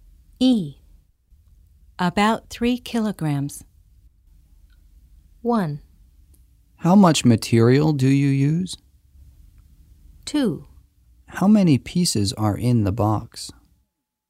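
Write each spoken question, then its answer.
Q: About 3 kilograms.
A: 1: How much material do you use?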